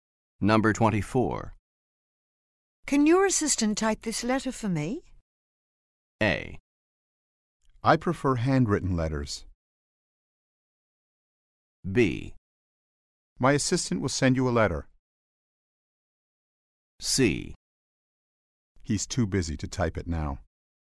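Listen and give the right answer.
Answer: C: He's too busy to type it now.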